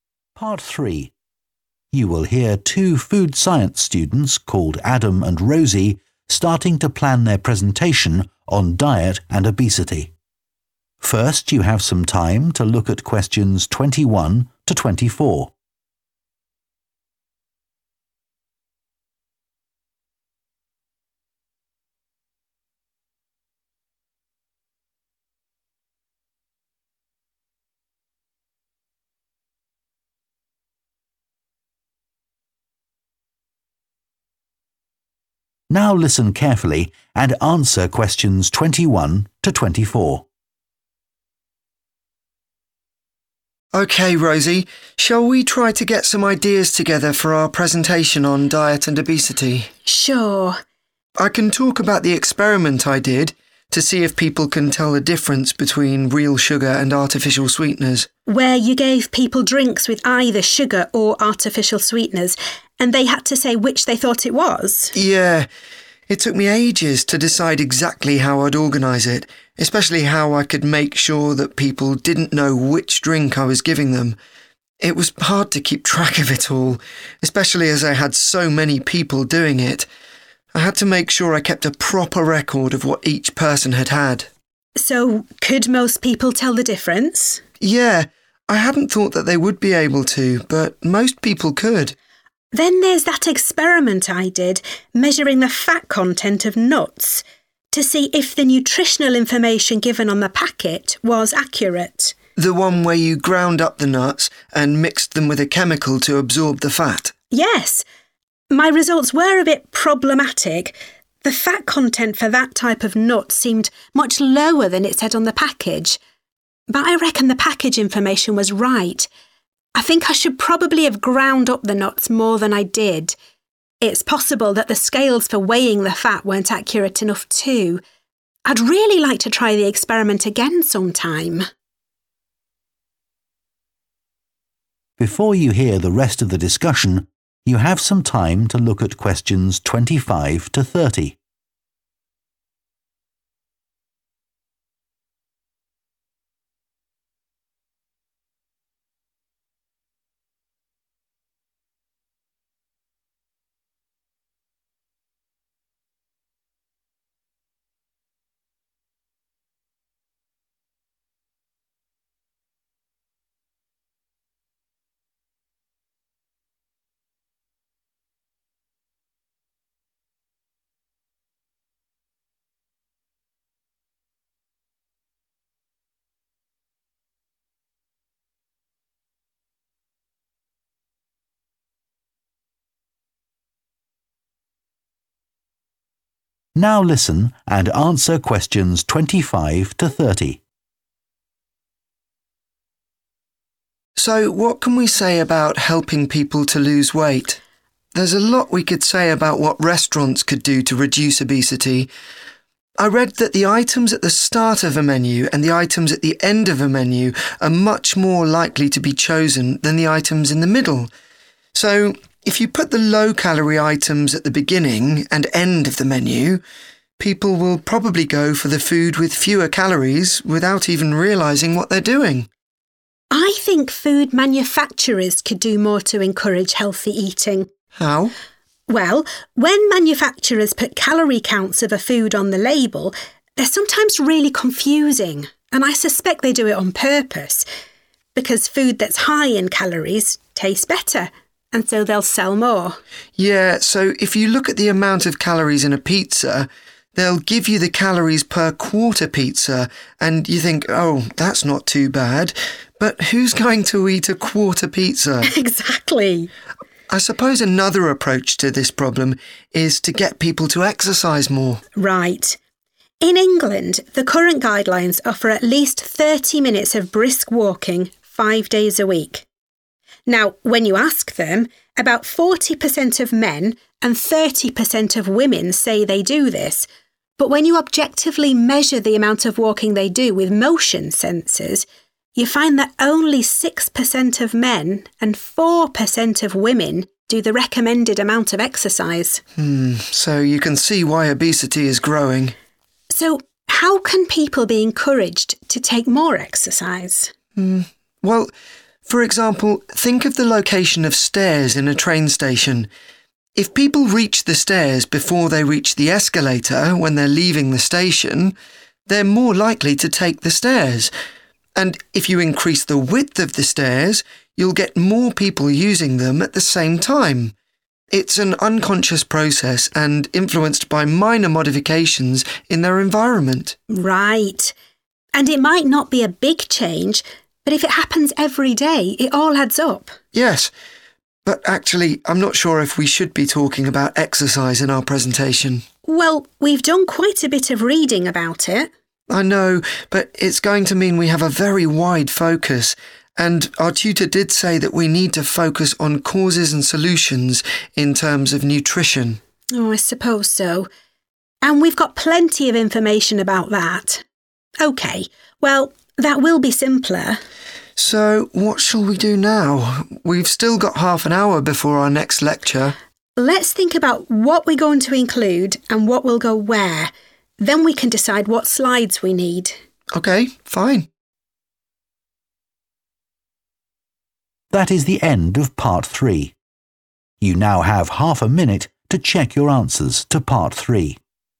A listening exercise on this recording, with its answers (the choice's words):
Choose TWO letters, A-E.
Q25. Adam suggests that restaurants could reduce obesity if their menus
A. offered fewer options.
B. had more low-calorie foods.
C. were organised in a particular way.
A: were organised in a particular way.

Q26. The students agree that food manufacturers deliberately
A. make calorie counts hard to understand.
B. fail to provide accurate calorie counts.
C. use ineffective methods to reduce calories.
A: make calorie counts hard to understand.

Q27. What does Rosie say about levels of exercise in England?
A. The amount recommended is much too low.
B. Most people overestimate how much they do.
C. Women now exercise more than they used to.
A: Most people overestimate how much they do.

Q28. Adam refers to the location and width of stairs in a train station to illustrate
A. practical changes that can influence people's behaviour.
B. methods of helping people who have mobility problems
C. ways of preventing accidents by controlling crowd movement.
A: practical changes that can influence people's behaviour.

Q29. What do the students agree about including reference to exercise in their presentation?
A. They should probably leave it out.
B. They need to do more research on it.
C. They should discuss this with their tutor.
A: They should probably leave it out.

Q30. What are the students going to do next for their presentation?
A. prepare some slides for it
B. find out how long they have for it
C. decide on its content and organisation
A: decide on its content and organisation